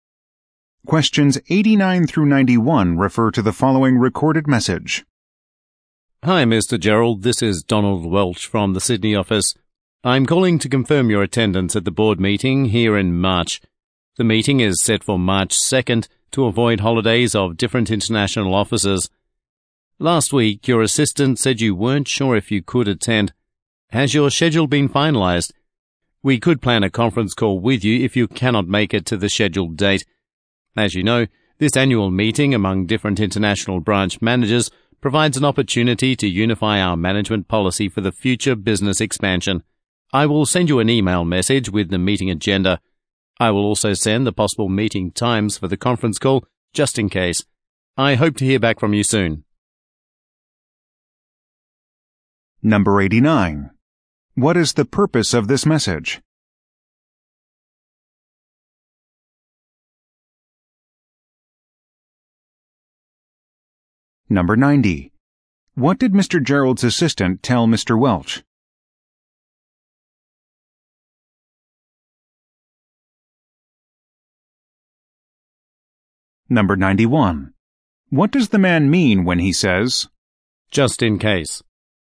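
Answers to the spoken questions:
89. To confirm Mr. Gerald's attendance at the board meeting
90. That Mr. Gerald wasn't sure if he could attend
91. The conference call may be needed if Mr. Gerald cannot attend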